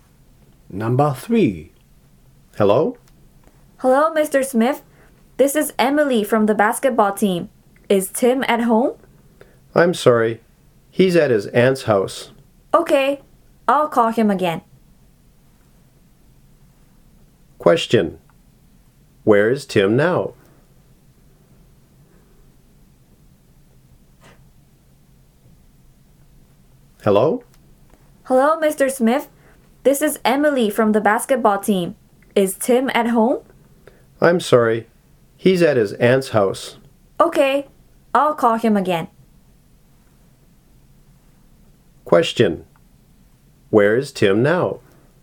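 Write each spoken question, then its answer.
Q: Where is Tim now?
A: At his aunt's house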